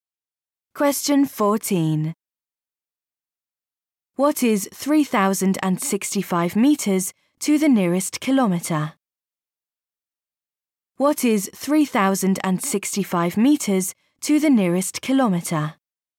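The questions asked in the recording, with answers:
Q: What is 3,065 meters to the nearest kilometer?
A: 3 kilometres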